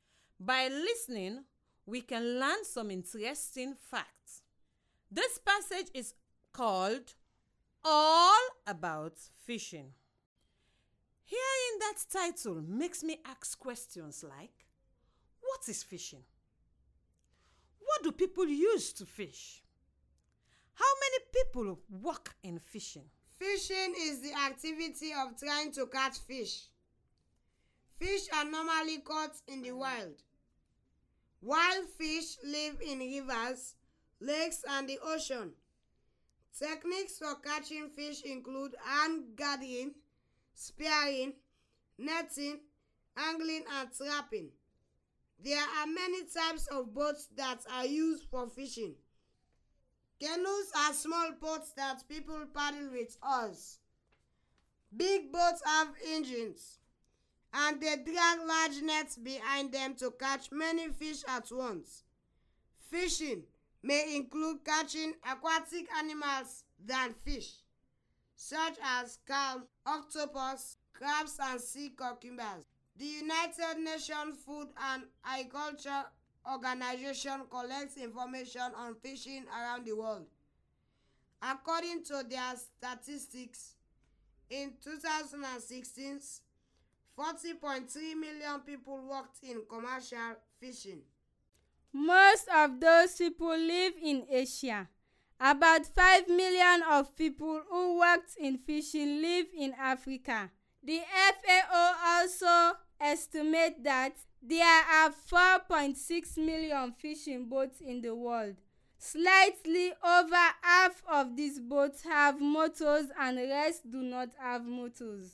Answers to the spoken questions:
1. Fishing is the activity of trying to catch fish.
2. Techniques for catching fish include hand gathering, spearing, netting, angling, and trapping.
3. in 2016, 40.3 million people worked in commercial fishing.